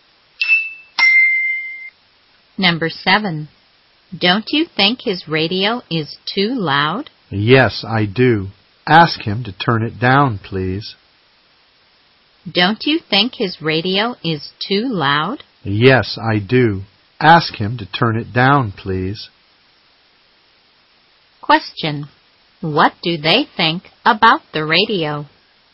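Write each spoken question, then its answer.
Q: What do they think about the radio?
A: It is too loud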